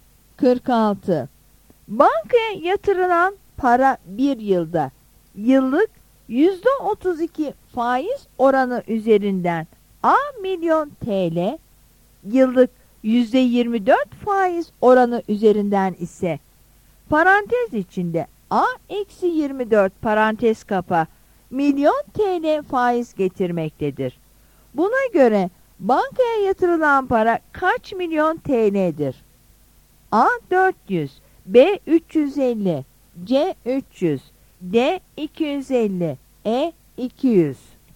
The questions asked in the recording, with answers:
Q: Buna göre bankaya yatırılan para kaç milyon TL'dir?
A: Yanıt C'dir.